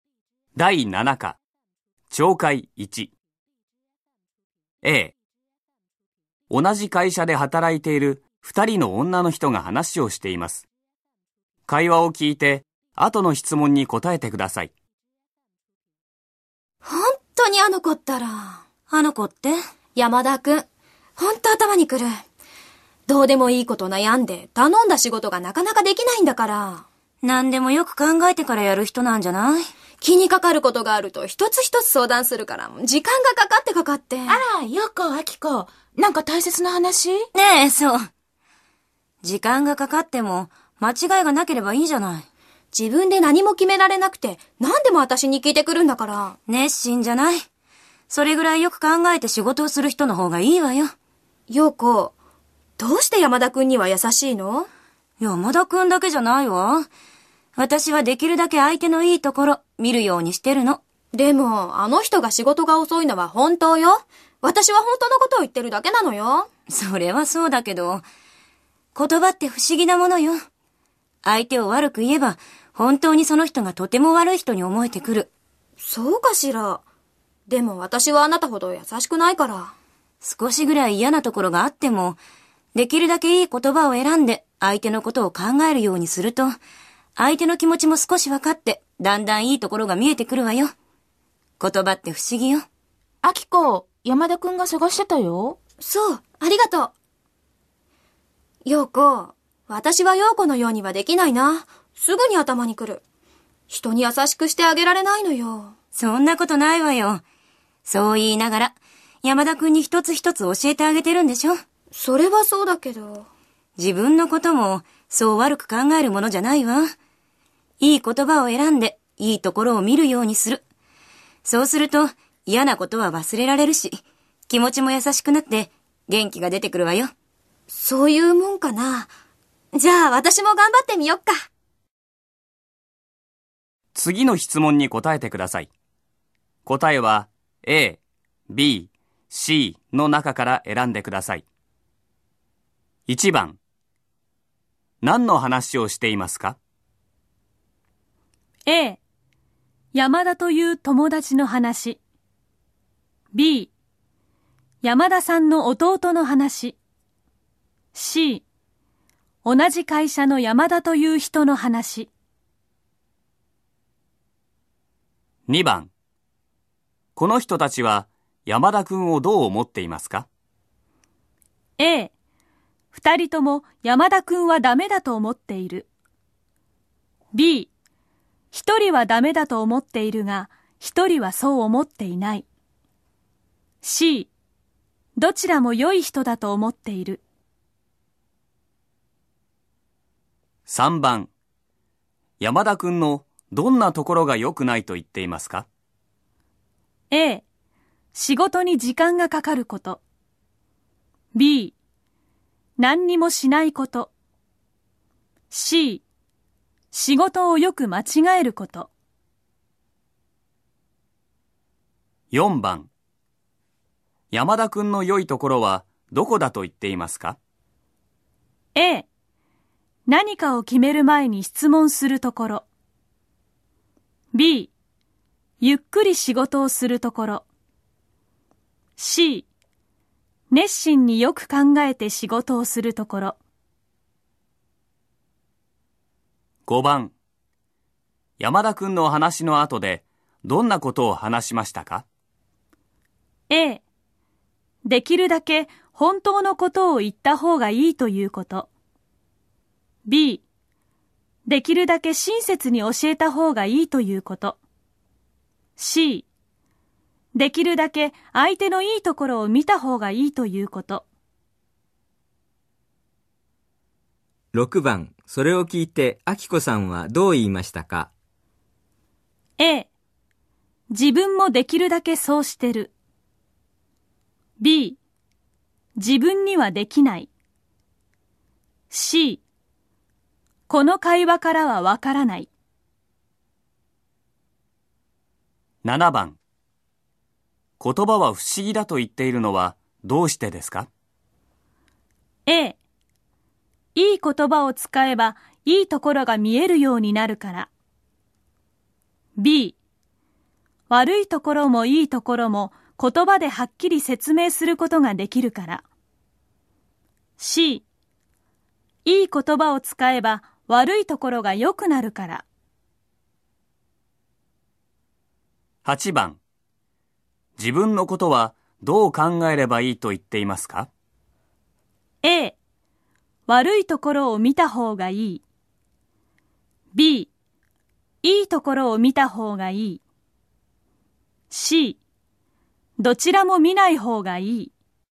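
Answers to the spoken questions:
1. C: 同じ会社の山田という人の話。
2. B: 一人はダメだと思っているが、一人はそう思っていない。
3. A: 仕事に時間がかかること。
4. C: 熱心によく考えて仕事をするところ
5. C: できるだけ相手のいいところを見た方がいいということ。
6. B: 自分にはできない。
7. A: いい言葉を使えばいいところが見えるようになるから。
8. B: いいところを見た方がいい。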